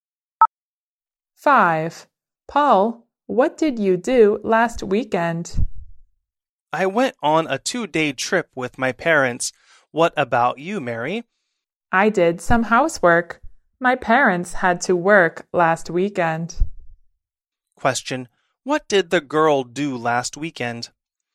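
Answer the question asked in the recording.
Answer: She did some housework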